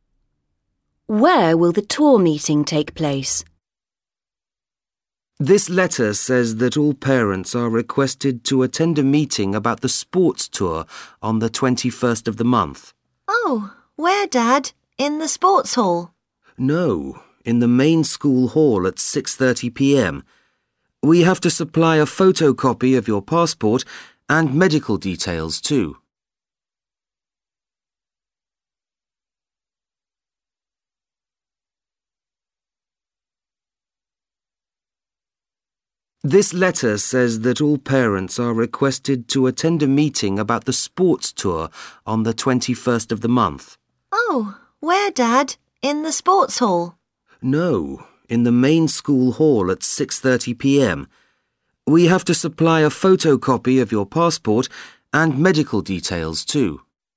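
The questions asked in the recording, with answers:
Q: Where will the tour meeting take place?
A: In the main school hall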